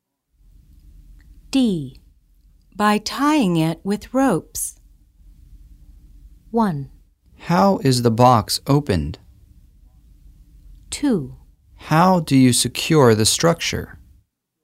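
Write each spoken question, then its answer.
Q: By tying it with ropes.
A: 2: How do you secure the structure?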